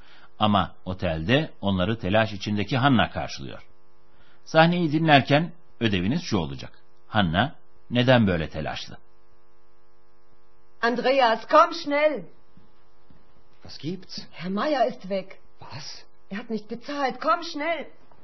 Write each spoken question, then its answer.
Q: Hanna neden böyle telaşlı?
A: Hanna'nın telaşlanmasının nedeni Bay Mayer'in ortadan kaybolmuş olması.